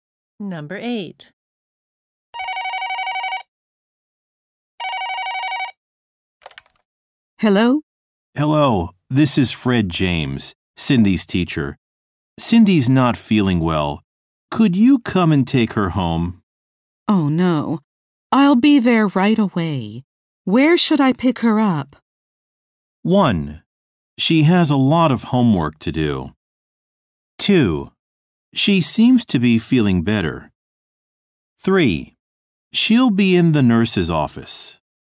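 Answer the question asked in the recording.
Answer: 3: She'll be in the nurse's office.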